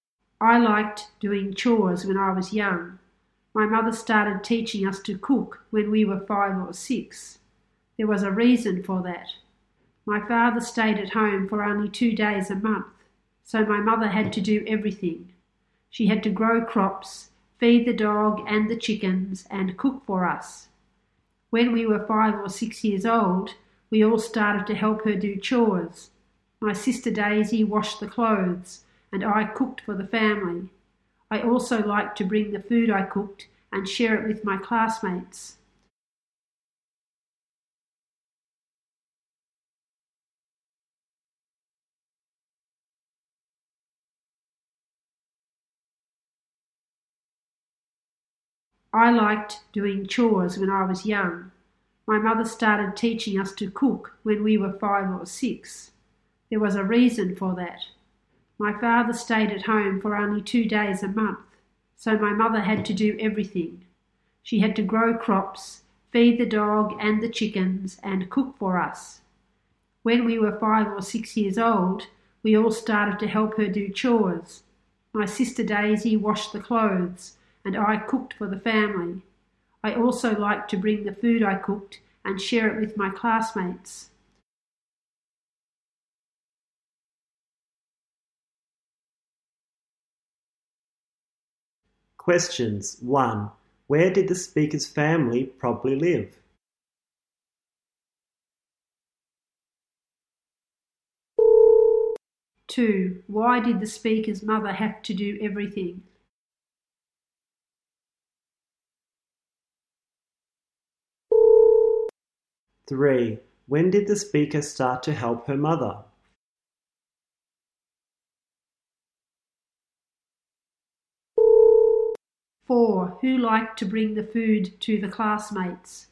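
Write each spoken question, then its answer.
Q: Why did the speaker's mother have to do everything?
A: The father stayed at home for only 2 days a month.

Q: When did the speaker start to help her mother?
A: When she was 5 or 6 years old.

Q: Who liked to bring the food to the classmates?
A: The speaker.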